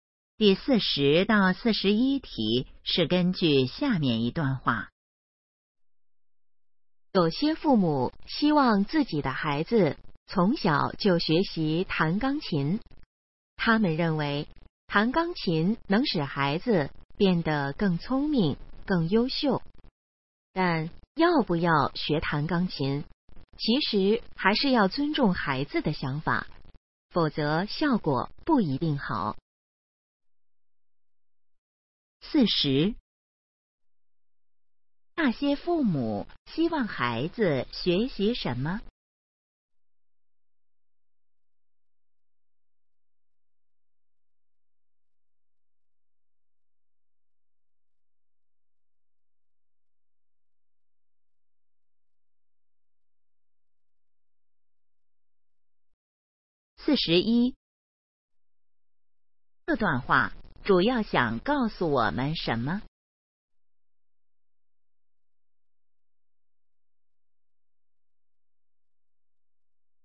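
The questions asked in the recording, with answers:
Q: 那些父母希望孩子学习什么?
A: 弹钢琴

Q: 这段话主要想告诉我们什么?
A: 要尊重孩子的想法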